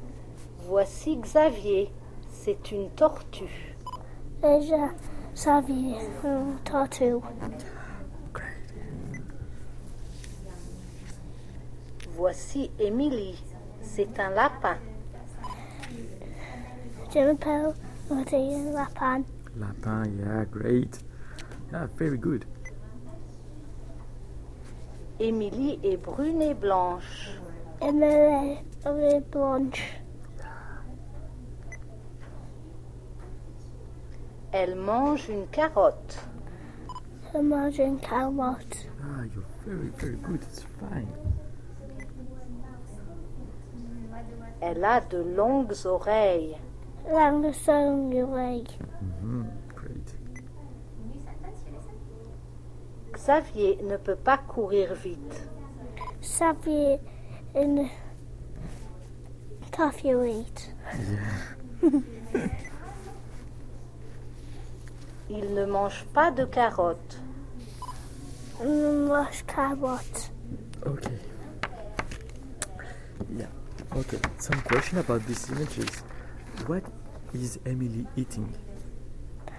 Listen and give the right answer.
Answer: Carrot.